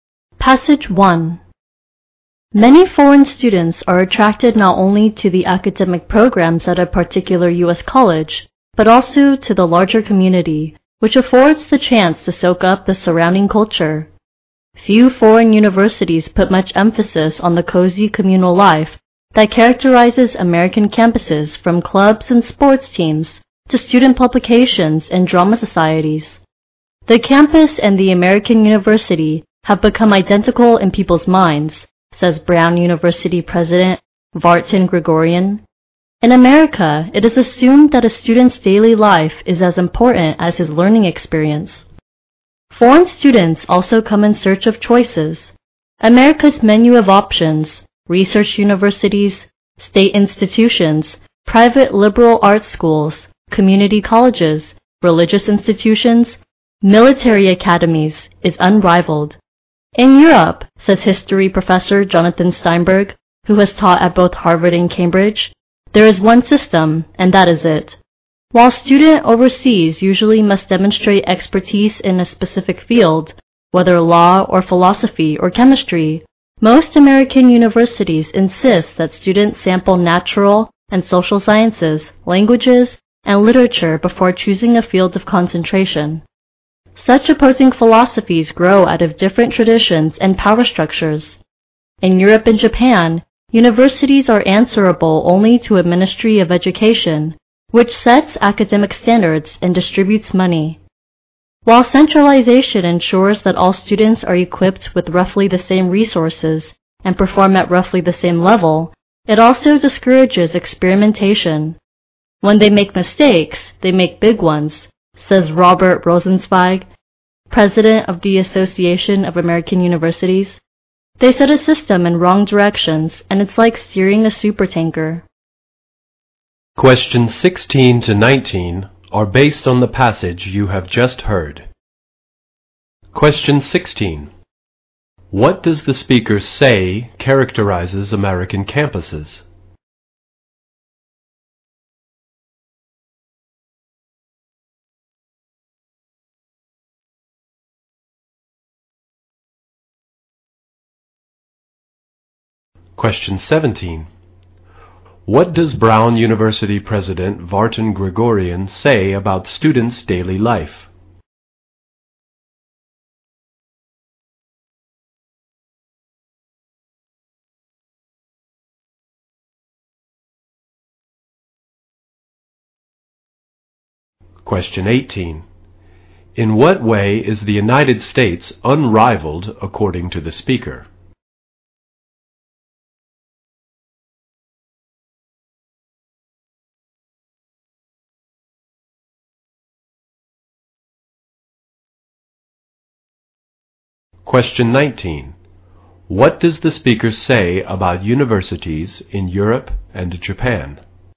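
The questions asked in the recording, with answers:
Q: What does the speaker say characterizes American campuses?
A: Cozy communal life.

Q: What does Brown University President Vartan Gregorian say about students' daily life?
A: It is as important as their learning experience.

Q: In what way is the United States unrivaled according to the speaker?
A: Its range of choices in types of institutions.

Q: What does the speaker say about universities in Europe and Japan?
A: They answer only to a Ministry of Education, which discourages experimentation.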